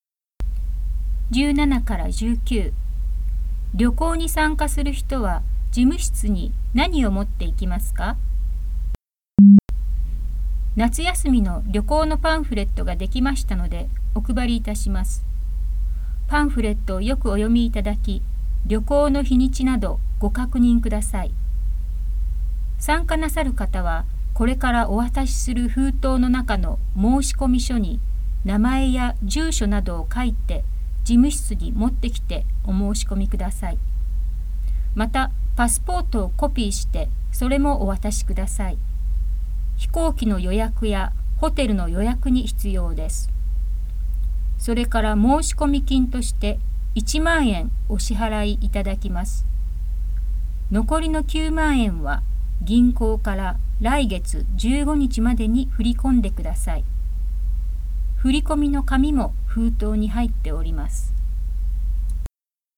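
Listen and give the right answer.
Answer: 申し込み書、パスポートのコピー、申し込み金1万円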